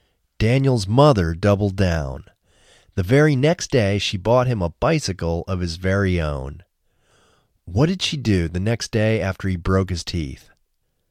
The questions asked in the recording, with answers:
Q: What did she do the next day after he broke his teeth?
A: The next day after he broke his teeth, she bought him a bicycle of his own.